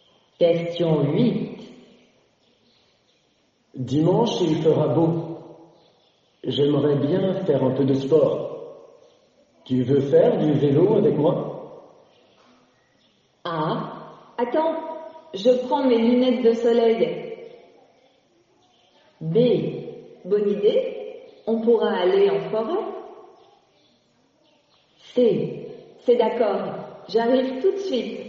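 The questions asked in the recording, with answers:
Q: Tu veux faire du vélo avec moi?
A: B: bonne idée, on pourra aller en forêt.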